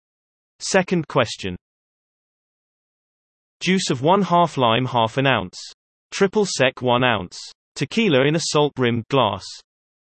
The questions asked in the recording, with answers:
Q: Juice of 1/2 lime, 1/2 ounce.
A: The answer, margarita.